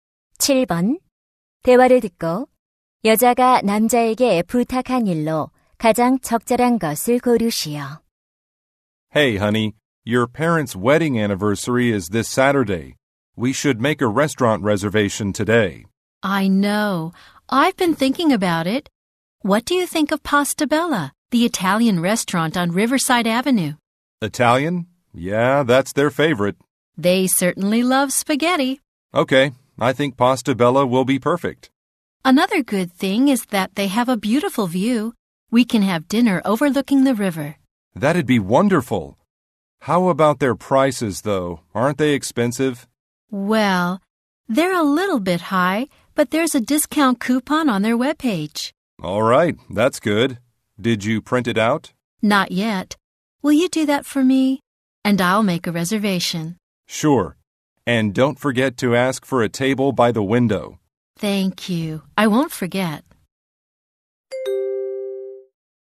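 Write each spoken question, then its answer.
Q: 대화를 듣고 여자가 남자에게 부탁한 일로 가장 적절한 것을 고르시오.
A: 할인 쿠폰 출력하기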